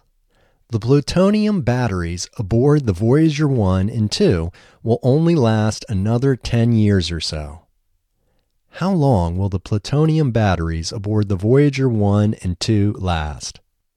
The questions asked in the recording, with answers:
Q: How long will the plutonium batteries aboard the Voyager 1 and 2 last?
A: The plutonium batteries aboard the Voyager 1 and 2 will only last another 10 years or so.